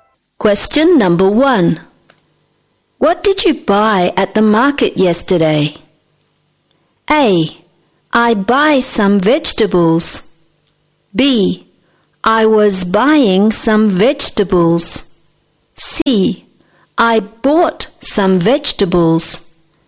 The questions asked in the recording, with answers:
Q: What did you buy at the market yesterday?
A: Jawaban yang benar adalah C.